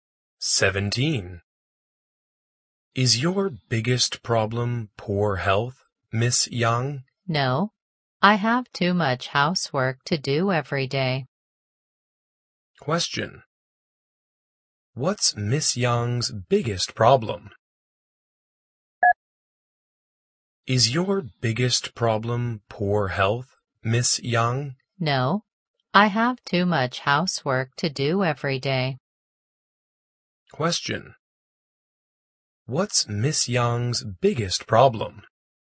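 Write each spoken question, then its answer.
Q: What's Miss Yang's biggest problem?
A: Too much housework to do every day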